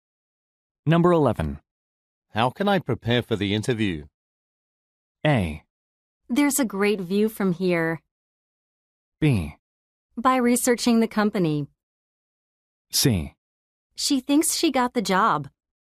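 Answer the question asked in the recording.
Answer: B: By researching the company.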